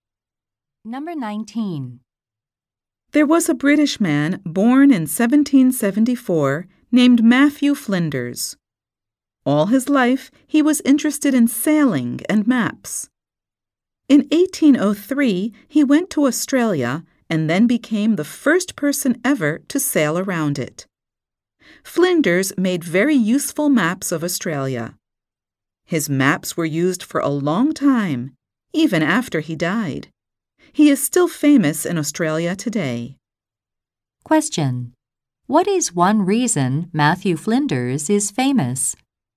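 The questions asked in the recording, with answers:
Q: What is one reason Matthew Flinders is famous?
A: He was the first person to sail around Australia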